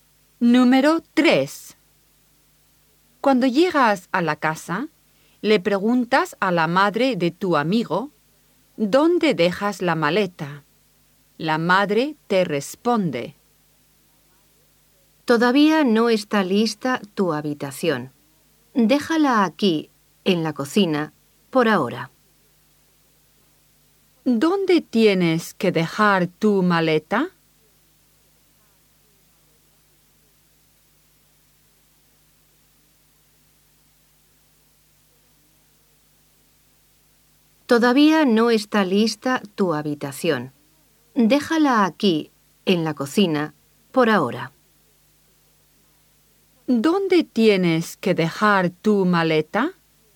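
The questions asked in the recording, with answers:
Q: ¿Dónde tienes que dejar tu maleta?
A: En la cocina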